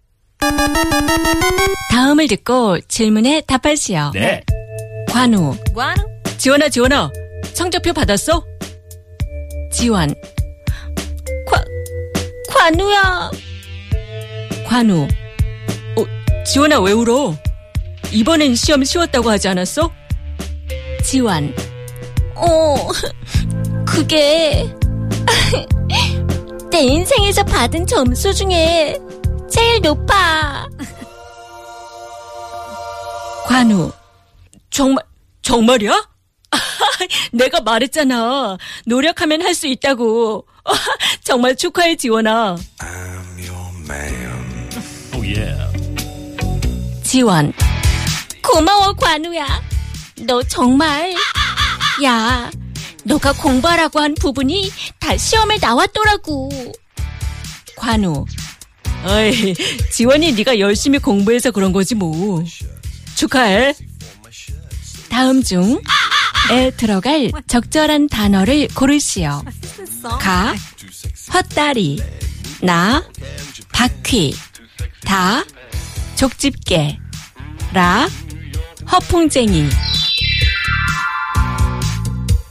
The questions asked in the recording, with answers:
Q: 다음 중. 에 들어갈 적절한 단어를 고르시오.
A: Chokchipke, tweezer.